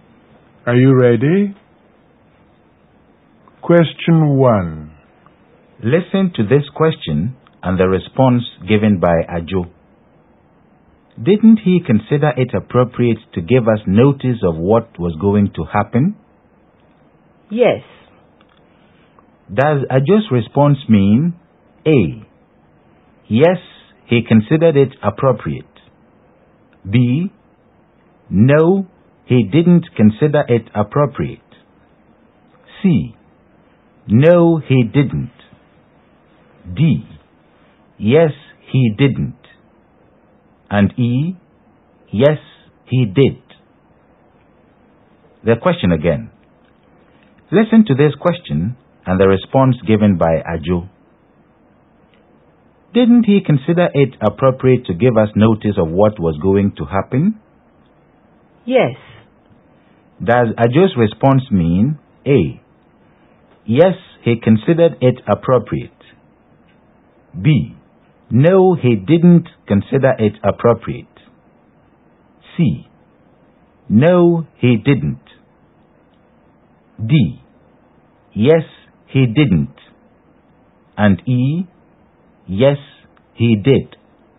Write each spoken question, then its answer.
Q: Does Ajo's response mean A, yes, he considered it appropriate?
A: The response means A. Yes, he considered it appropriate. And E. Yes, he did.